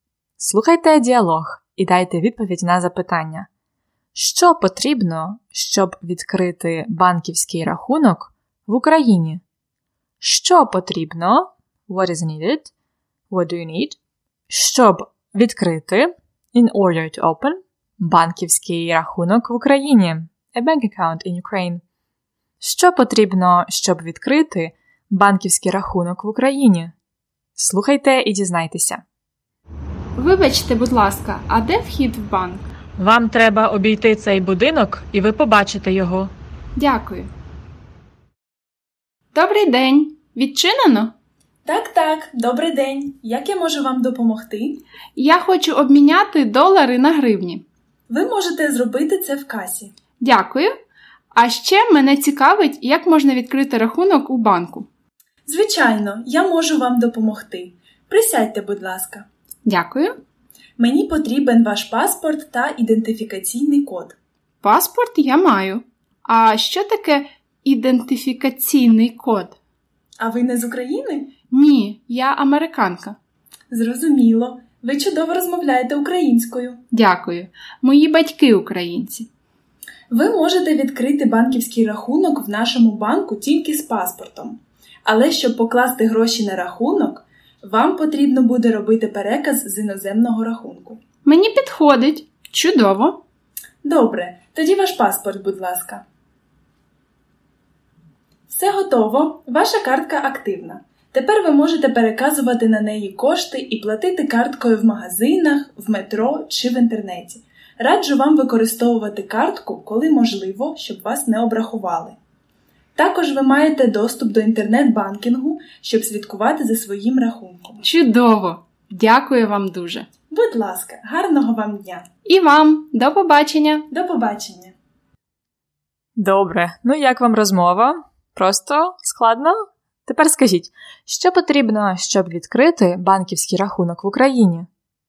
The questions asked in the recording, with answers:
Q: Що потрібно, щоб відкрити банківський рахунок в Україні?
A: Потрібно два документи: паспорт і ідентифікаційний код.